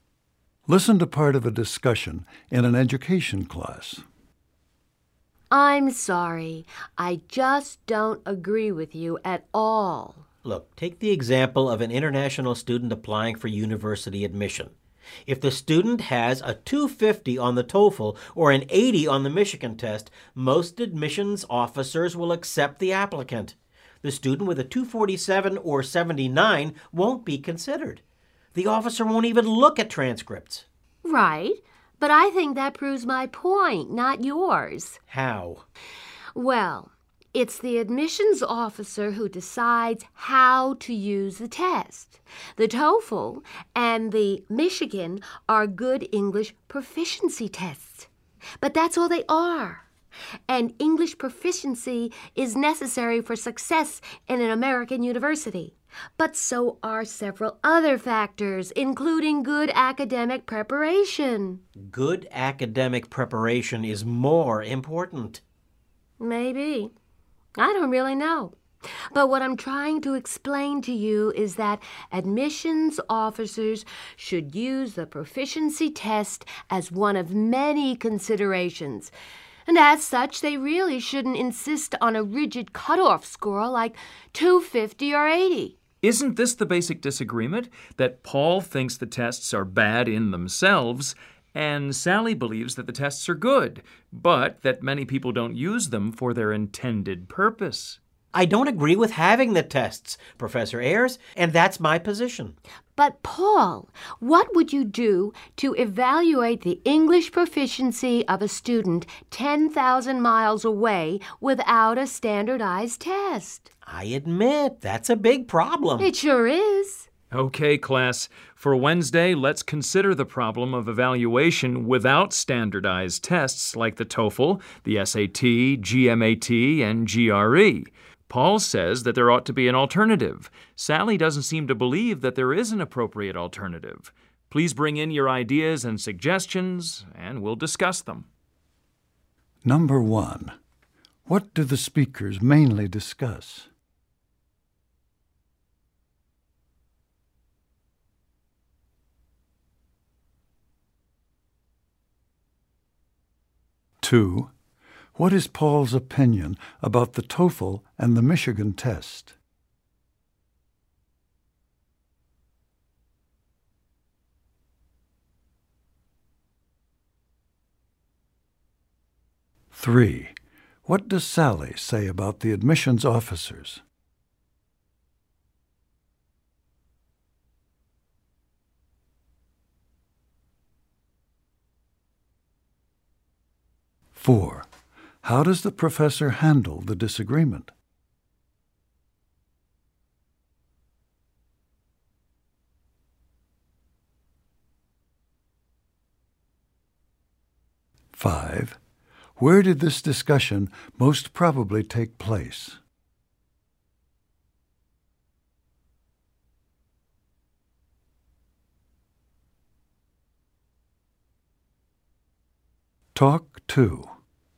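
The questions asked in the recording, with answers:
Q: what do the speakers mainly discuss?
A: How English proficiency tests like the TOEFL and Michigan test are used in university admissions

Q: what is Paul's opinion about the TOEFL and the Michigan test?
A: He disagrees with having the tests; they are bad in themselves

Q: what does Sally say about the admissions officers?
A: They should use the test as one of many considerations, not a rigid cutoff score

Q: how does the professor handle the disagreement?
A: He sums up both positions and asks the class to bring ideas on alternatives for Wednesday

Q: where did this discussion most probably take place?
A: In an education class at a university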